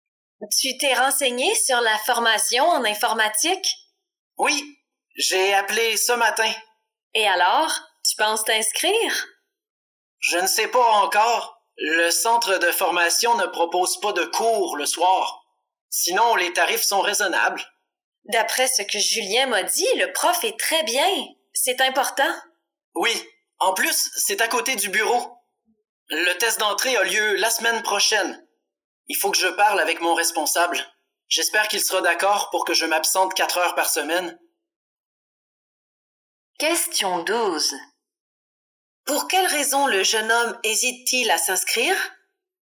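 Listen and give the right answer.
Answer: Le centre de formation ne propose pas de cours le soir.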